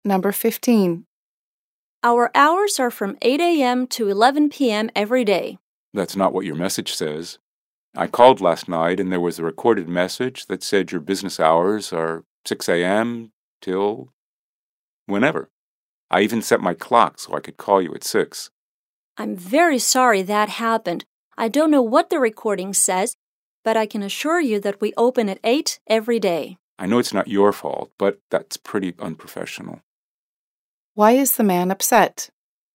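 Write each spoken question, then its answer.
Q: Why is the man upset?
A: The recorded message gave the wrong business hours (said 6 a.m.), so he called too early.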